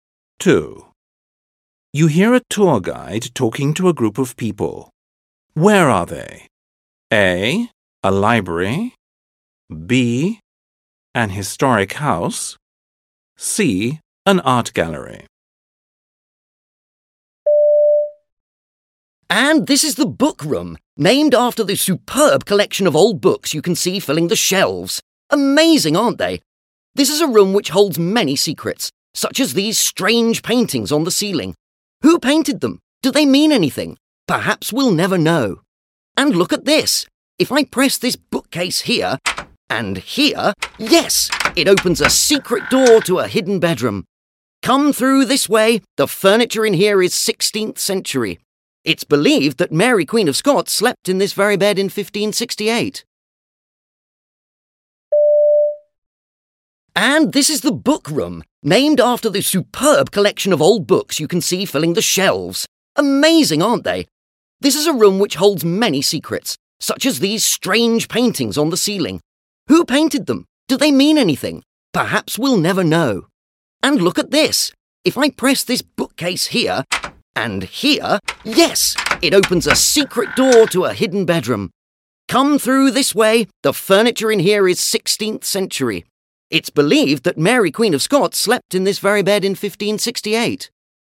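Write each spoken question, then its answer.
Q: Where are they?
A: B: An historic house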